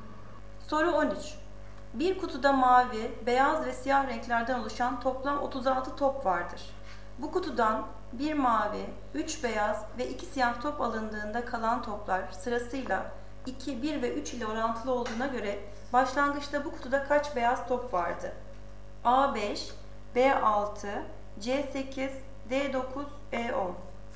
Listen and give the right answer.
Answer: Doğru cevap C 8.